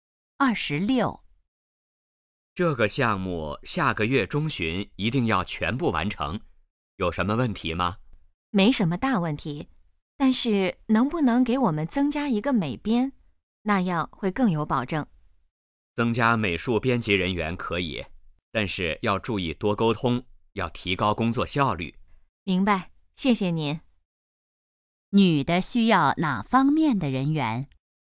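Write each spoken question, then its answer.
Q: 女的需要哪方面的人员?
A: 美术编辑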